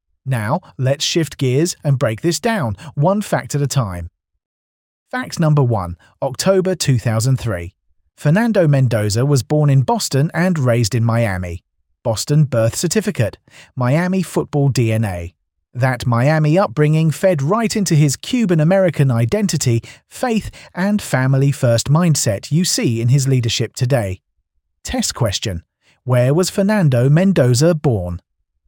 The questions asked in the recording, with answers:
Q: Where was Fernando Mendoza born?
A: Correct answer, Boston.